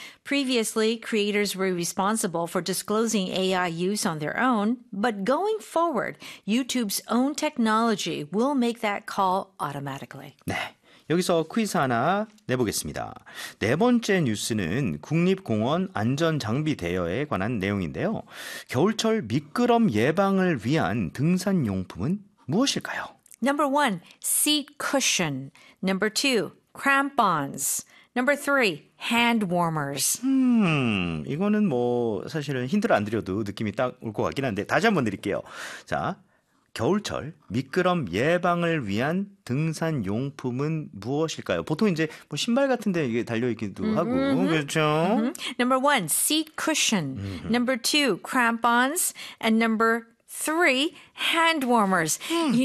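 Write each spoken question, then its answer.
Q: 겨울철 미끄럼 예방을 위한 등산용품은 무엇일까요?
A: 2: crampons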